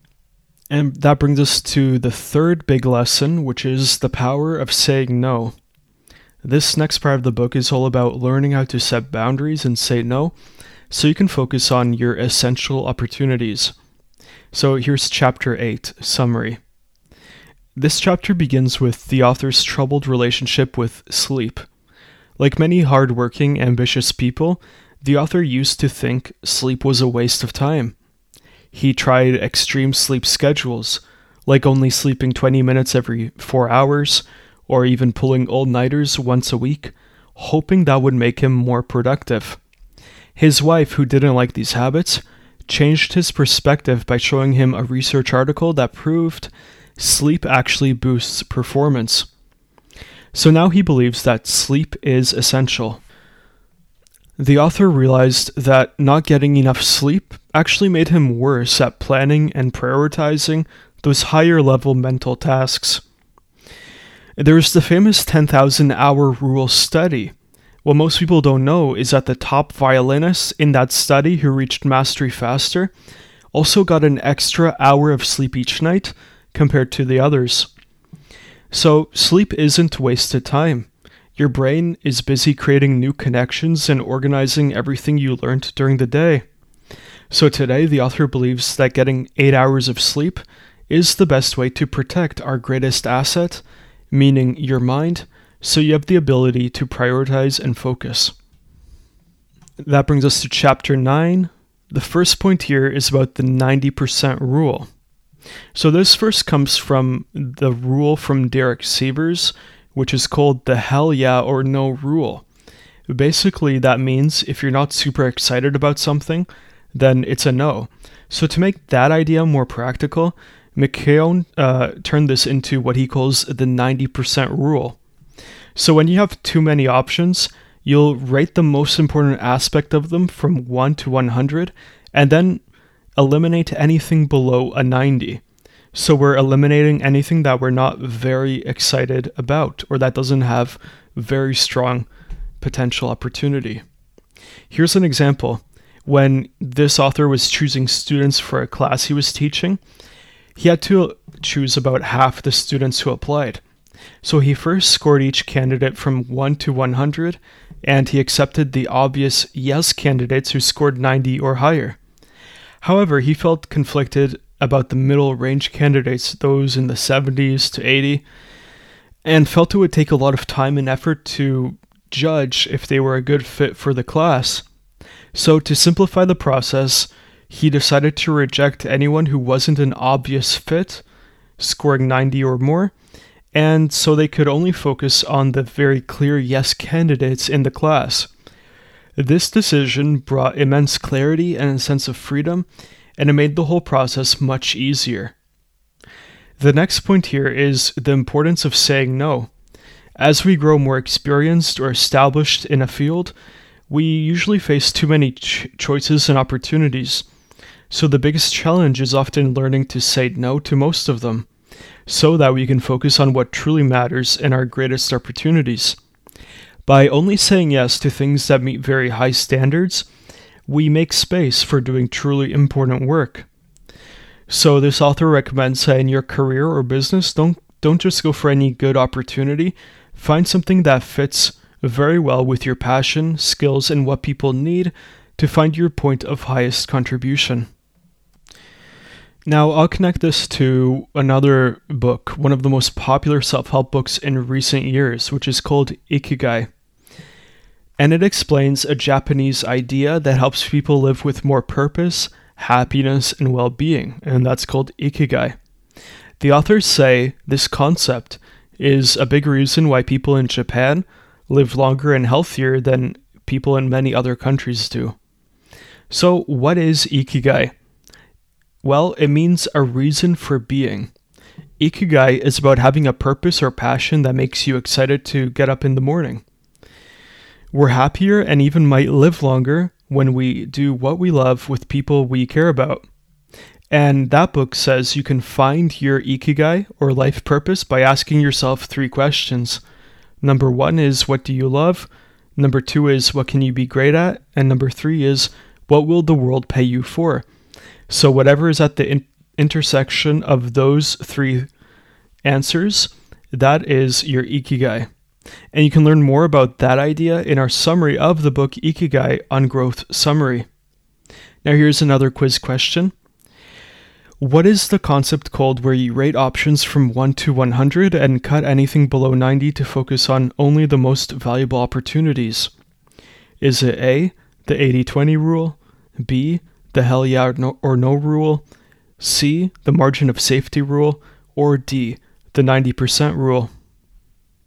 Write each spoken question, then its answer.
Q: What is the concept called where you rate options from 1 to 100 and cut anything below 90 to focus on only the most valuable opportunities?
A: So the correct answer here is D, the 90% rule.